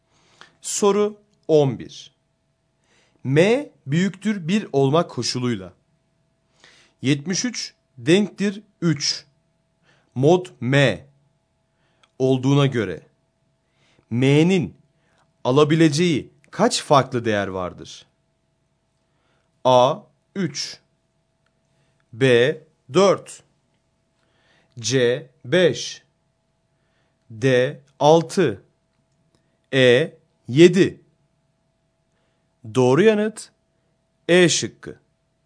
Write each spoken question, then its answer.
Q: 73 denktir 3. Mod M olduğuna göre M'nin alabileceği kaç farklı değer vardır?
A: Doğru yanıt E şıkkı.